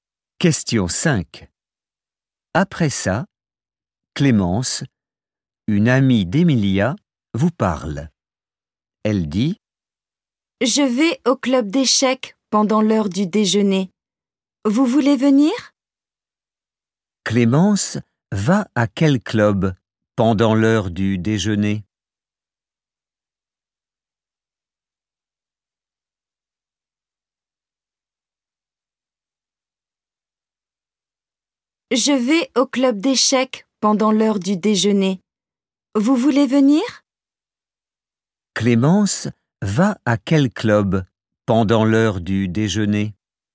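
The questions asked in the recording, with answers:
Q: Clémence va à quel club pendant l'heure du déjeuner ?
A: Le club d'échecs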